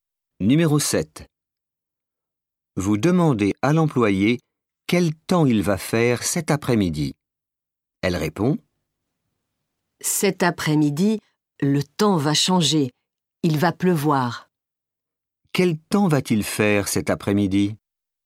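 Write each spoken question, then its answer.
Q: Quel temps va-t-il faire cet après-midi?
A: Il va pleuvoir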